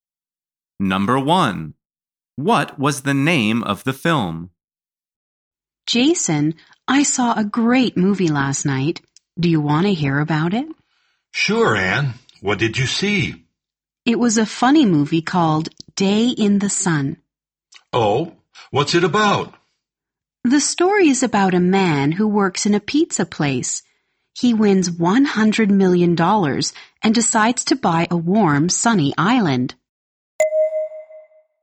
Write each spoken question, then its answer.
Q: What was the name of the film?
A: The answer is Day in the Sun.